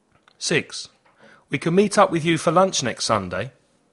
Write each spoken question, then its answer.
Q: We can meet up with you for lunch next Sunday.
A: Can. Positive.